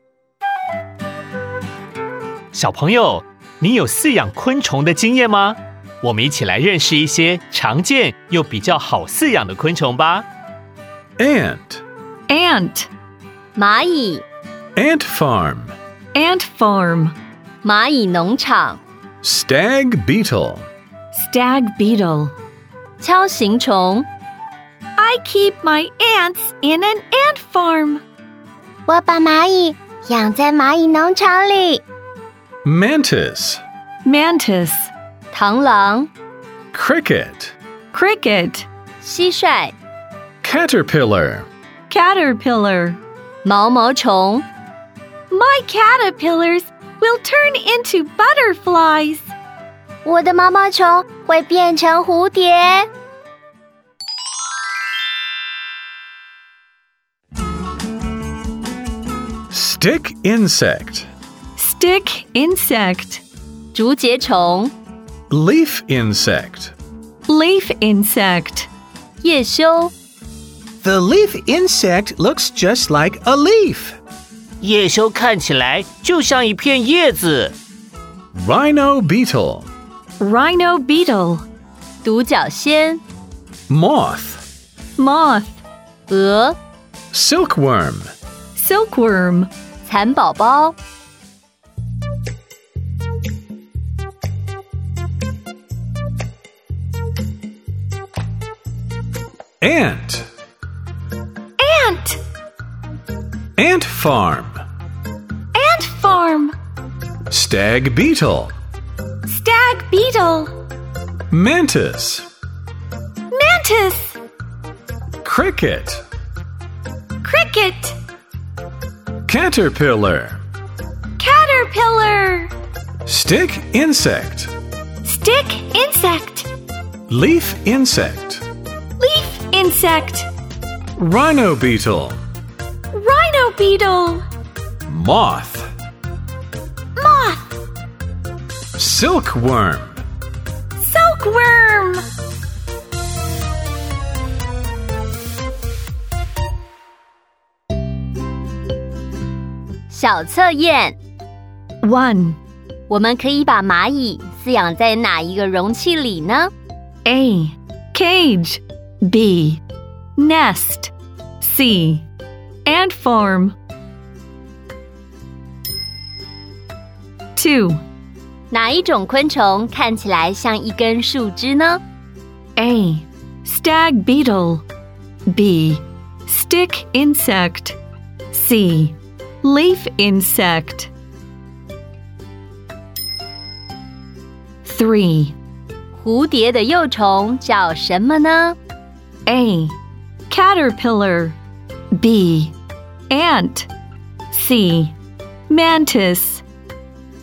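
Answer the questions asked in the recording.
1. C: Ant farm
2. B: Stick insect
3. A: Caterpillar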